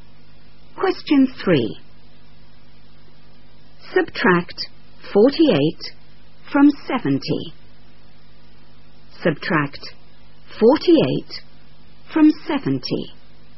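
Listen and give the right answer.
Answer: 22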